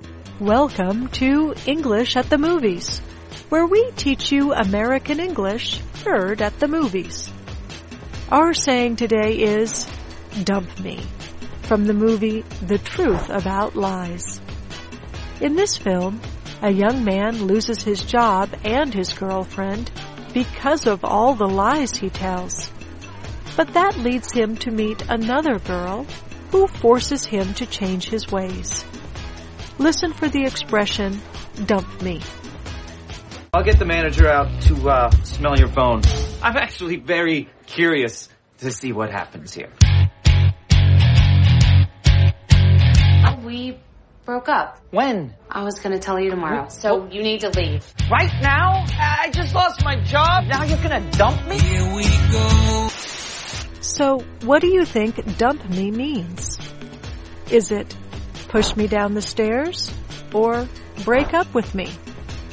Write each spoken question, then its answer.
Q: So what do you think dump me means?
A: Dump me means to break up with me.